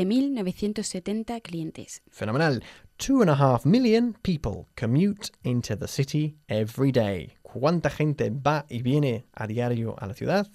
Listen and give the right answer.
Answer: 2,500,000 personas.